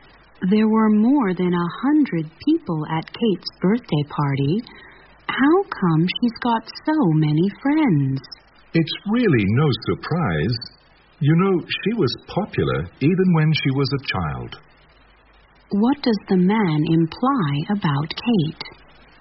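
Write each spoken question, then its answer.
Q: What does the man imply about Kate?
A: Kate has always been popular, even as a child, so having many friends is no surprise.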